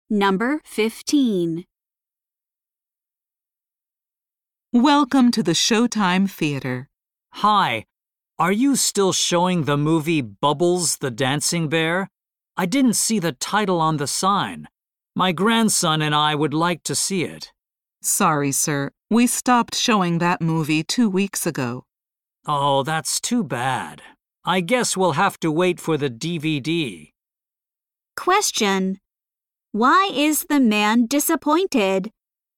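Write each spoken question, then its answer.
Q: Why is the man disappointed?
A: The theater stopped showing the movie he wanted to see.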